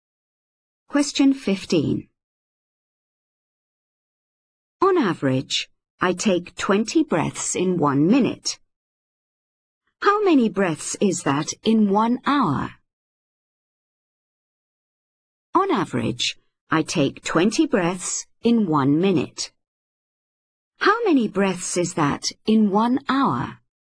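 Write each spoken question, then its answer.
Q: How many breaths is that in 1 hour?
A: 1200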